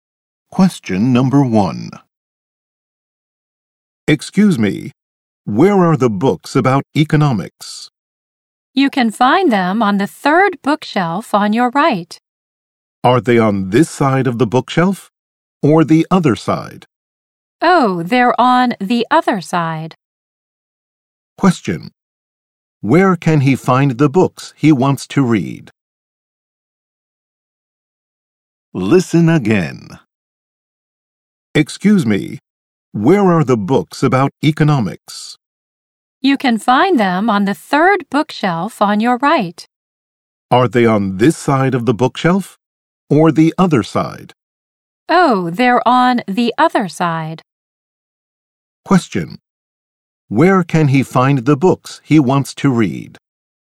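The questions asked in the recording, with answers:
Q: Where can he find the books he wants to read?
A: On the other side of the third bookshelf on his right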